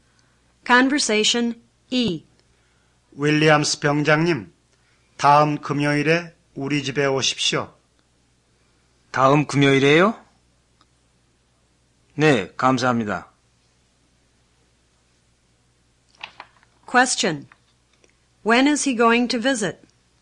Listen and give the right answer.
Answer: He's going to visit next Friday.